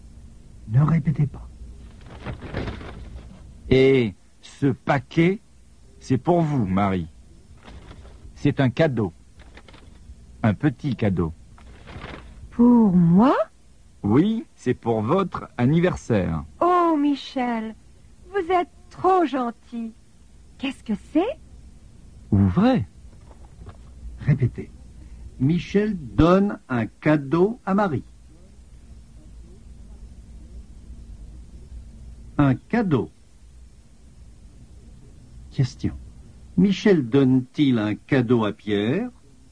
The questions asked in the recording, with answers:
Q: Michel donne-t-il un cadeau à Pierre?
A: Non, il ne donne pas de cadeau à Pierre.